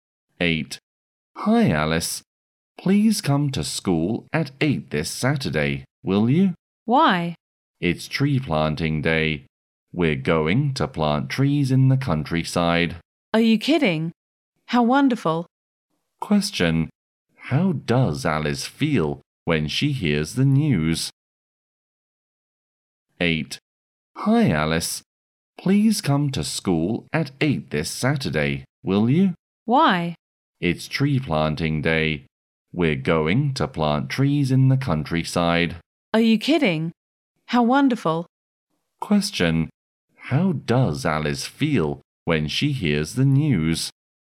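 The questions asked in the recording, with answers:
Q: How does Alice feel when she hears the news?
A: Excited and happy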